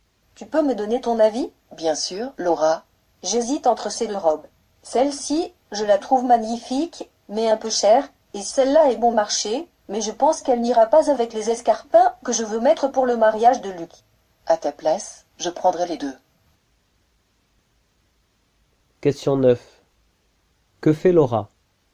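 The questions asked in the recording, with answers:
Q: Que fait Laura?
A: Elle demande un avis car elle hésite entre deux robes pour le mariage de Luc.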